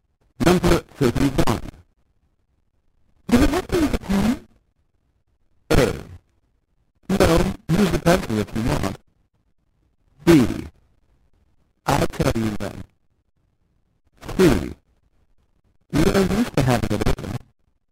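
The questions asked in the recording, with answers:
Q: Do we have to use a pen?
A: A: No, use the pencil if you want.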